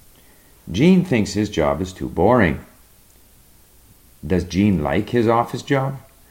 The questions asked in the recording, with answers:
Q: Does Jean like his office job?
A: No, he doesn't like his office job.